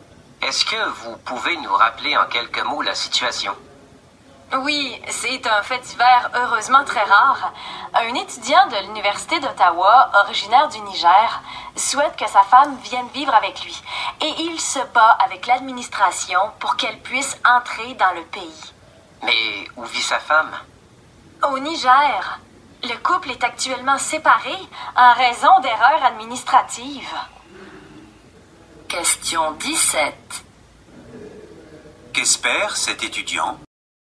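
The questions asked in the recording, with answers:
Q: Qu'espère cet étudiant ?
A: Que sa femme vienne vivre avec lui au Canada (à Ottawa).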